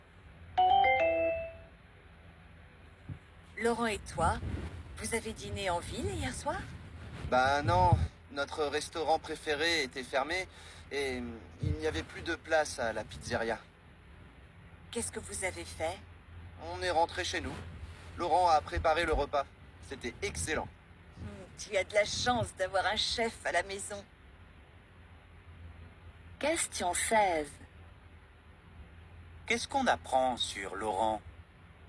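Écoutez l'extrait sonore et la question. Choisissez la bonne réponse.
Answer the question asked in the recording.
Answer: Il cuisine très bien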